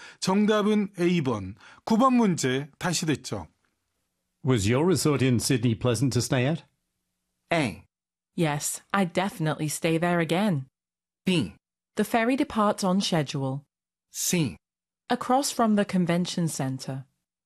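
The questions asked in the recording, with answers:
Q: Was your resort in Sydney pleasant to stay at?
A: A: Yes, I'd definitely stay there again.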